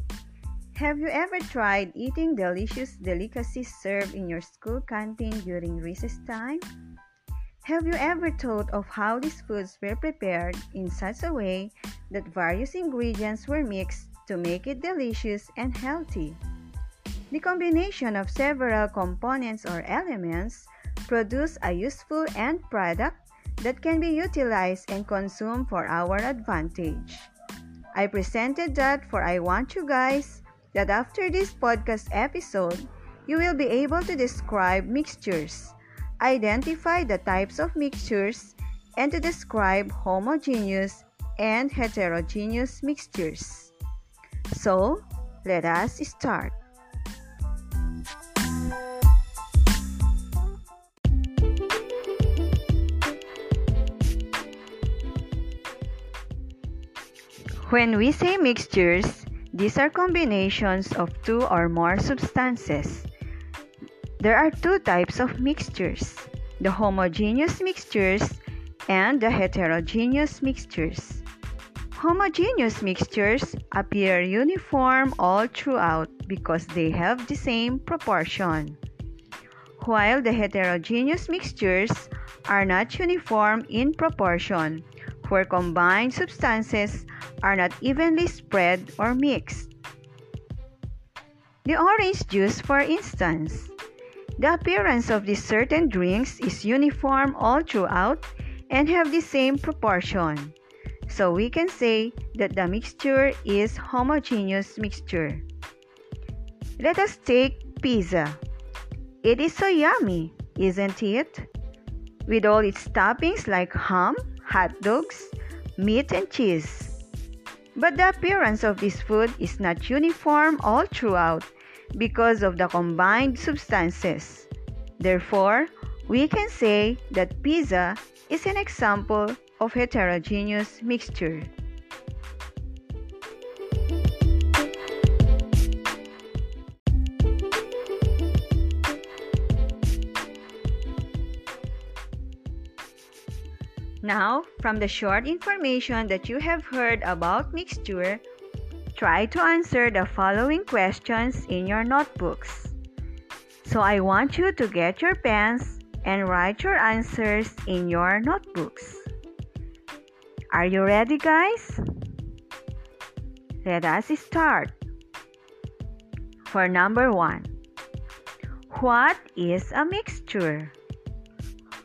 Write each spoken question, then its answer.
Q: what is a mixture?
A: Mixture is a combination of two or more substances.